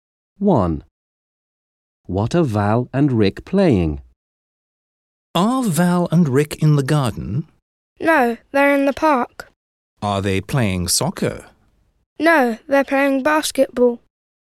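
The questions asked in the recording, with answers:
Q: What are Val and Rick playing?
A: basketball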